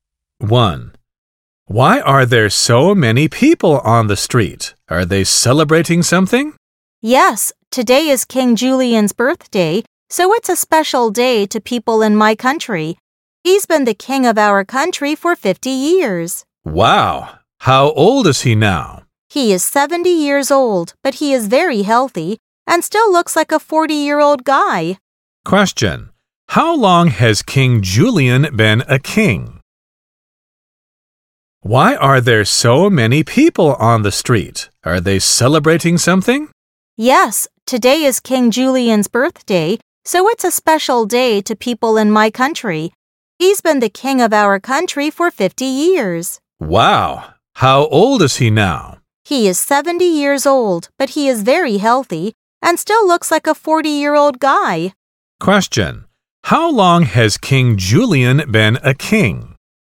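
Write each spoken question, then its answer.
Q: How long has King Julian been a king?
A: For 50 years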